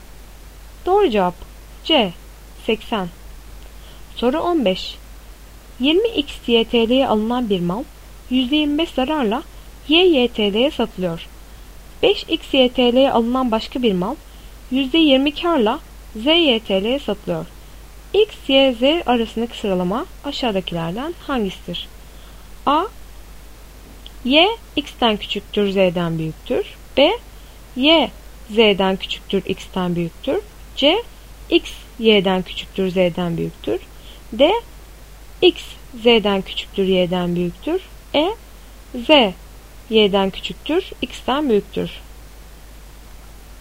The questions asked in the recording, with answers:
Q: X, Y, Z arasındaki sıralama aşağıdakilerden hangisidir?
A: Doğru cevap E. Z, Y'den küçüktür, X'ten büyüktür.